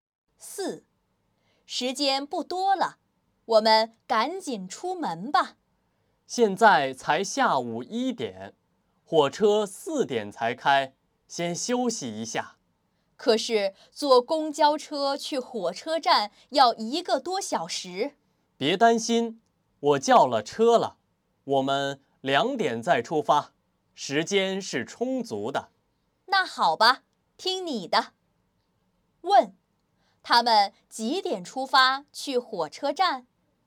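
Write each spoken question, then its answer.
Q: 他们几点出发去火车站?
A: 两点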